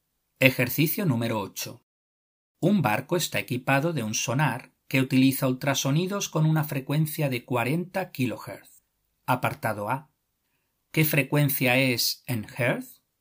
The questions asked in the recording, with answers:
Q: Apartado A. ¿Qué frecuencia es en hertz?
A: 40 kHz es igual a 40.000 Hz.